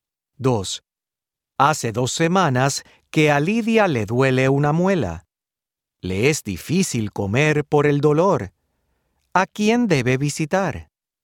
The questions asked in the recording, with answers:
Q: ¿A quién debe visitar?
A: Debe visitar a una dentista.